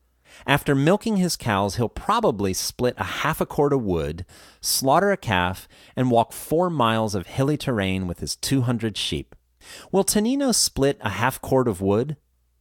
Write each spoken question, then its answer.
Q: Will Tonino split a half cord of wood?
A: Yes, he'll probably split a half cord of wood.